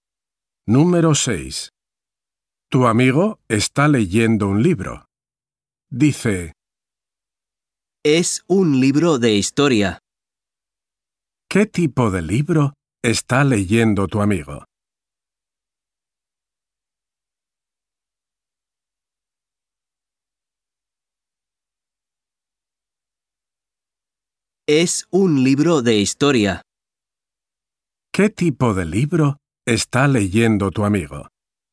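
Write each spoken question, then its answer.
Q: ¿Qué tipo de libro está leyendo tu amigo?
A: Un libro de historia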